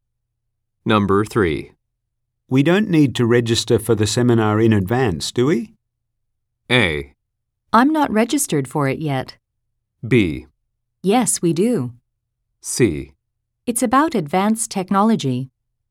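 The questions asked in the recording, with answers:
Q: We don't need to register for the seminar in advance, do we?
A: B: Yes, we do.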